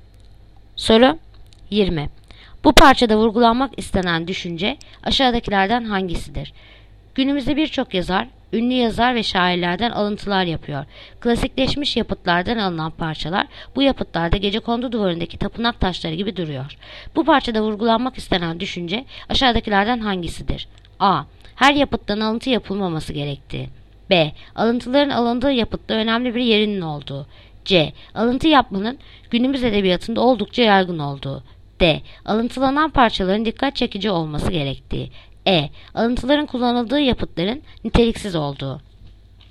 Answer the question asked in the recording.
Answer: Edirne. Alıntıların kullanıldığı yapıtların niteliksiz olduğu.